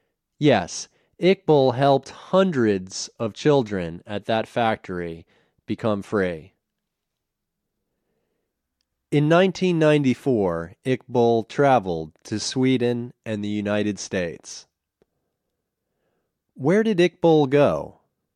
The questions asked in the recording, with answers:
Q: Where did Iqbal go?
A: He went to Sweden and the United States.